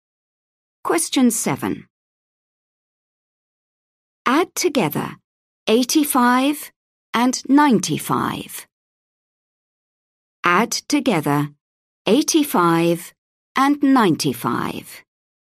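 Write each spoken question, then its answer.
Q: Add together 85 and 95.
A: 180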